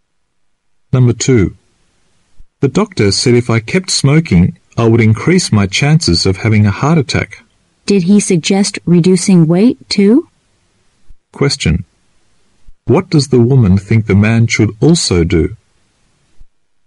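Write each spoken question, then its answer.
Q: What does the woman think the man should also do?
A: Lose weight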